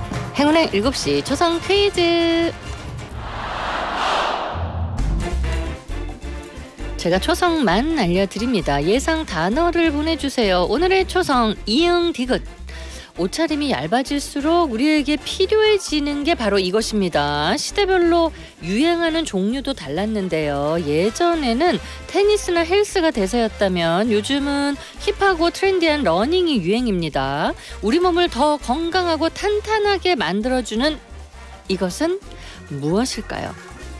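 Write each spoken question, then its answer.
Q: 우리 몸을 더 건강하고 탄탄하게 만들어주는 이것은 무엇일까요?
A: 운동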